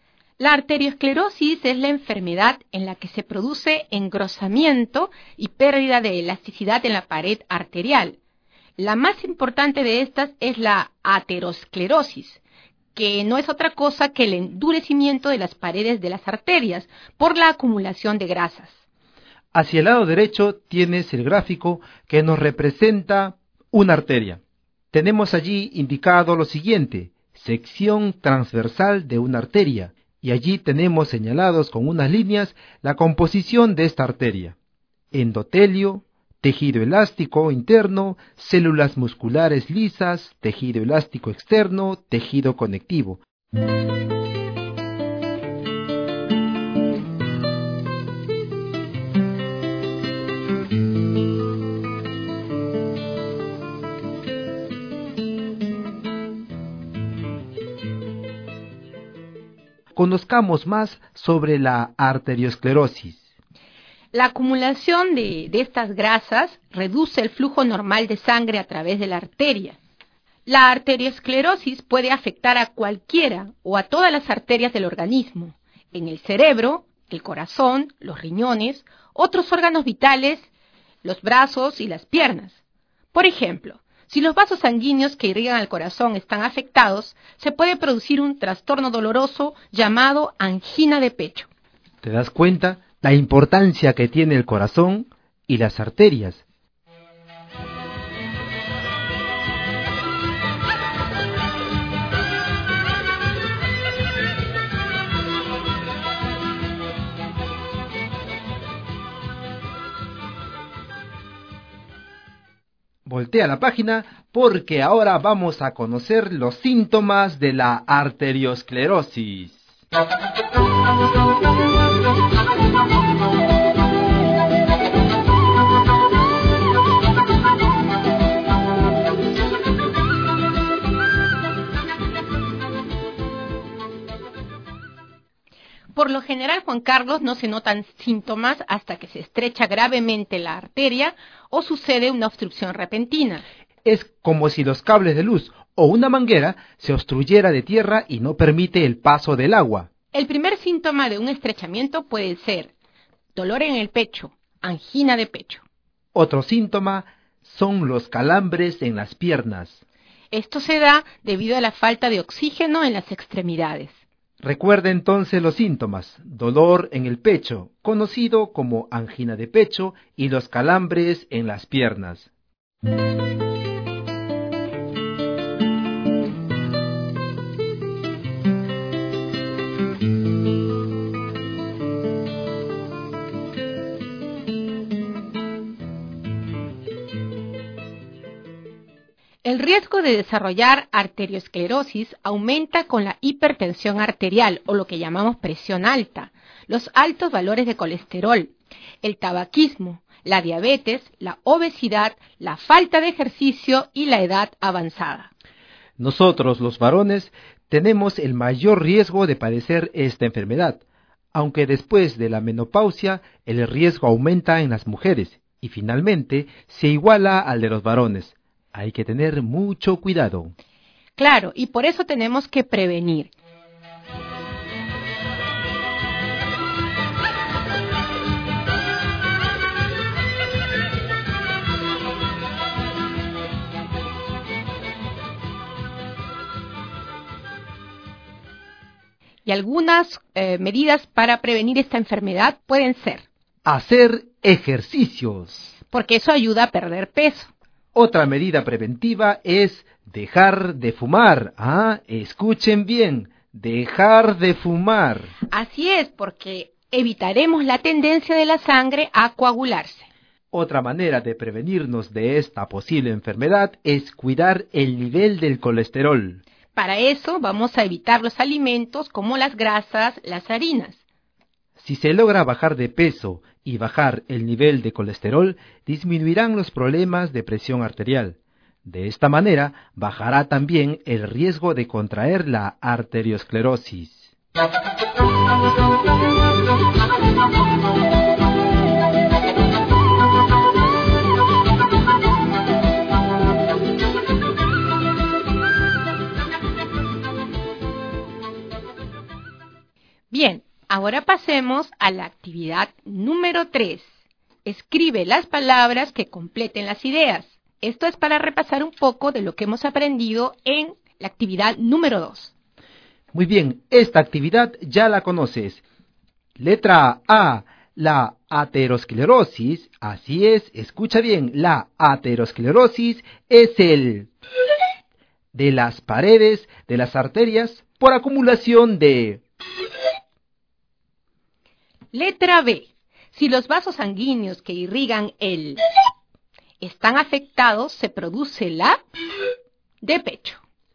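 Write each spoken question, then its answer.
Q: la aterosclerosis es el de las paredes de las arterias por acumulación de...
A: endurecimiento; grasas

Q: Letra B. Si los vasos sanguíneos que irrigan el están afectados, se produce la de pecho.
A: corazón; angina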